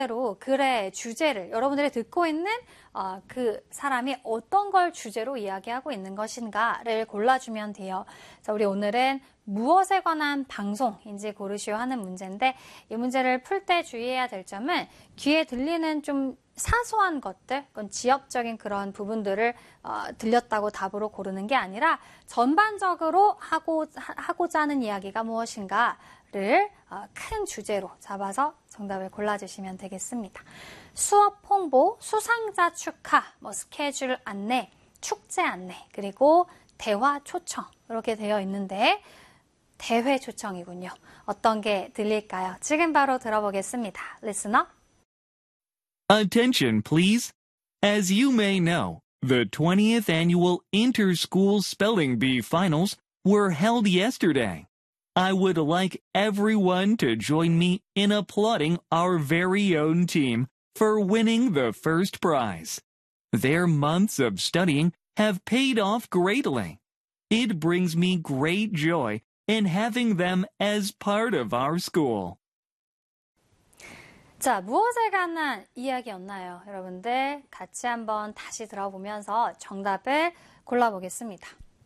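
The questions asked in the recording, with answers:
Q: 자, 우리 오늘은 무엇에 관한 방송인지 고르시오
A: 수상자 축하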